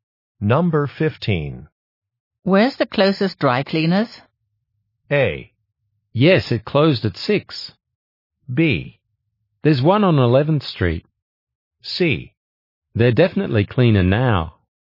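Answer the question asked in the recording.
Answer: B: There's one on 11th Street.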